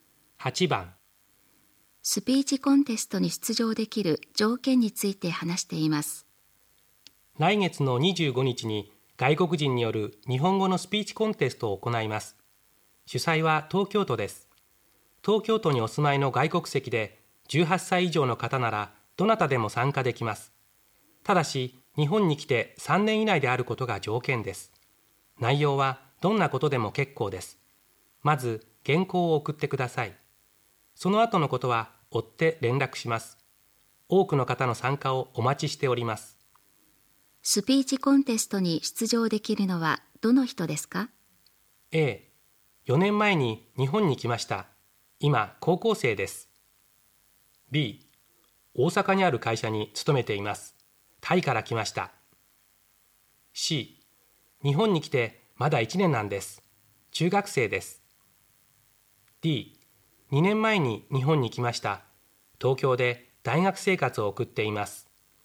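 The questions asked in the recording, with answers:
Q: スピーチコンテストに出場できるのはどの人ですか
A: D: 2年前に日本に来ました東京で大学生活を送っています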